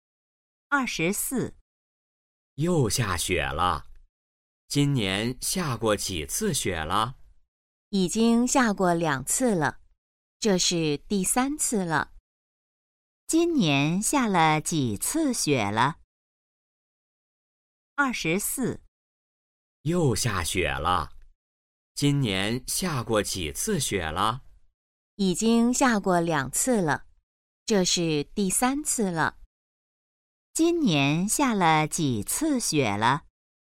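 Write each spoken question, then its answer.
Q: 今年下了几次雪了?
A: 三次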